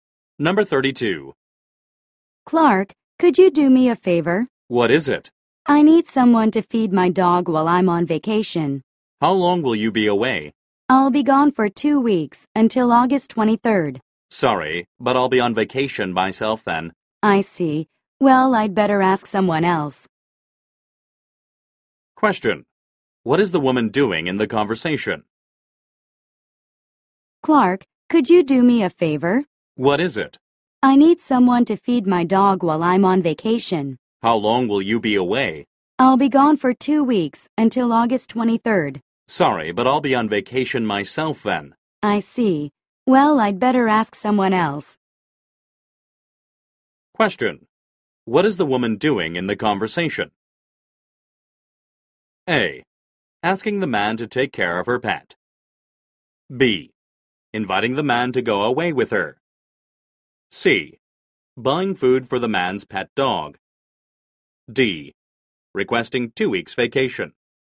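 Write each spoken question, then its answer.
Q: What is the woman doing in the conversation?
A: A: Asking the man to take care of her pet.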